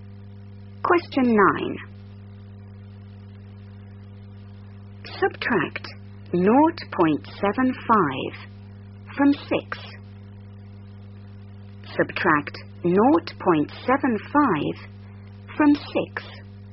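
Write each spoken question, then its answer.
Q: Subtract 0.75 from 6.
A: 5.25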